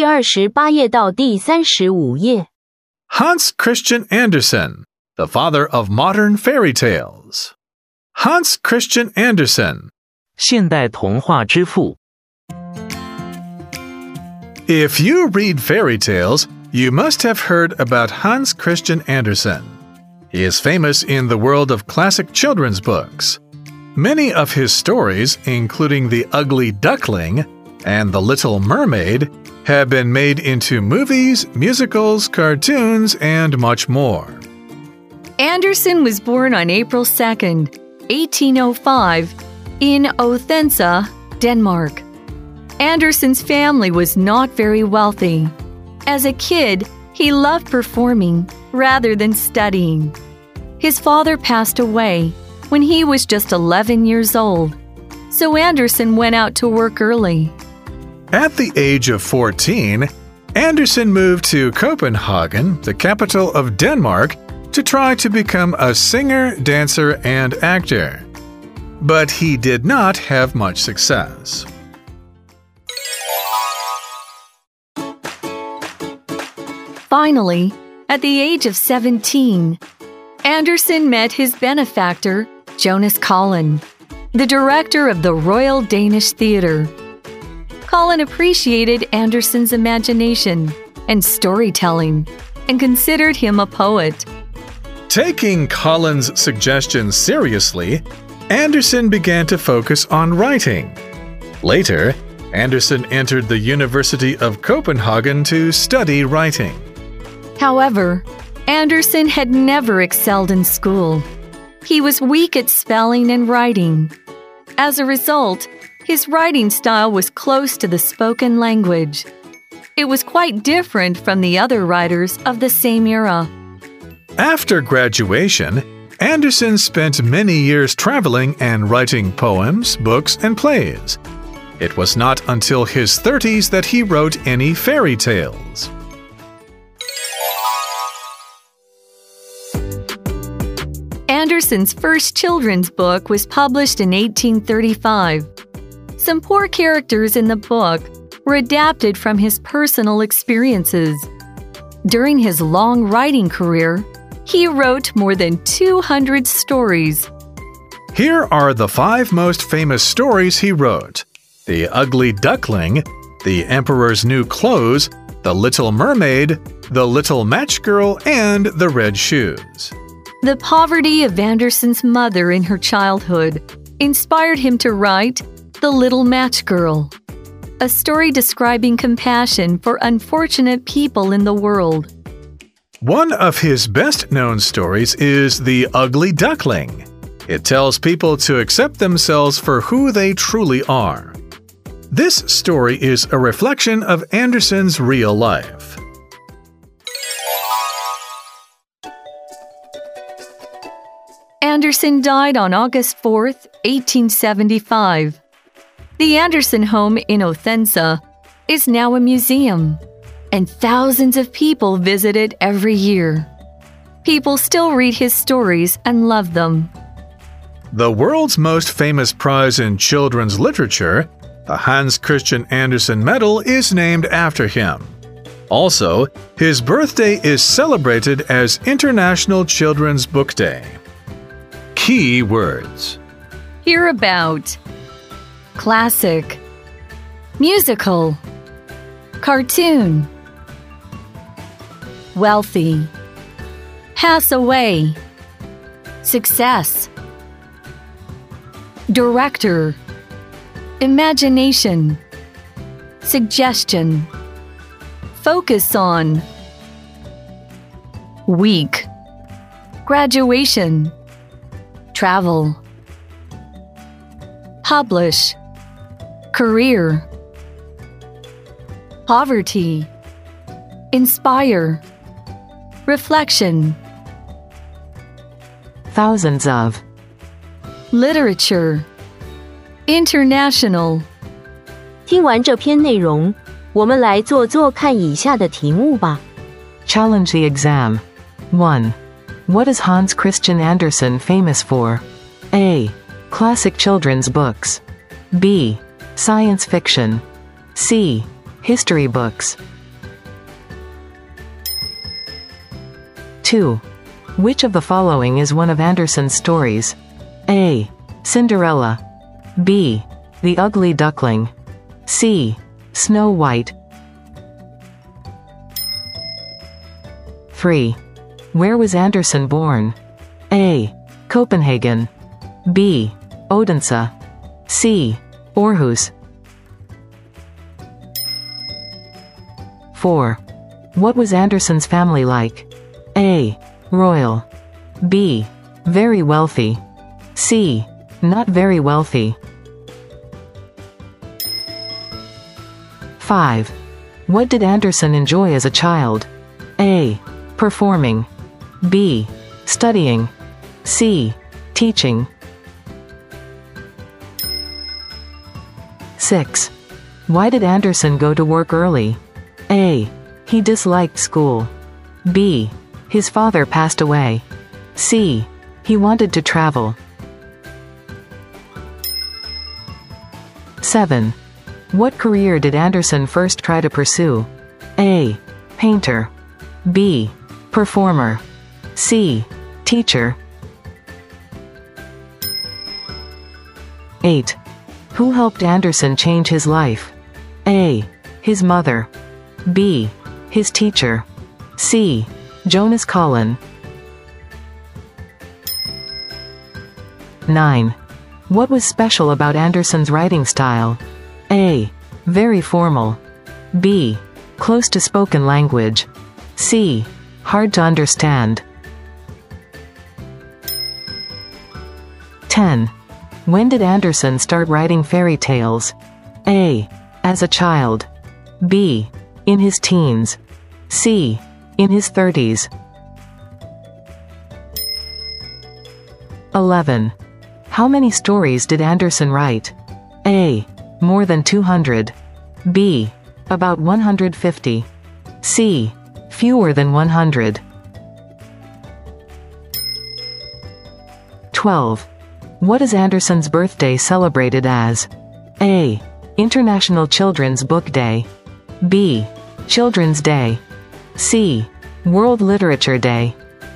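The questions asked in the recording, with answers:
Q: What is Hans Christian Andersen famous for?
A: A: Classic children's books.

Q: Which of the following is one of Andersen's stories?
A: B: The Ugly Duckling.

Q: Where was Andersen born?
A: B: Odense.

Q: What was Andersen's family like?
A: C: Not very wealthy.

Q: What did Andersen enjoy as a child?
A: A: Performing.

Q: Why did Andersen go to work early?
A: B: His father passed away.

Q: What career did Andersen first try to pursue?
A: B: Performer.

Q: Who helped Andersen change his life?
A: C: Jonas Collin.

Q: What was special about Andersen's writing style?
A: B: Close to spoken language.

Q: When did Andersen start writing fairy tales?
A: C: In his 30s.

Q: How many stories did Andersen write?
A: A: More than 200.

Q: What is Andersen's birthday celebrated as?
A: A: International Children's Book Day.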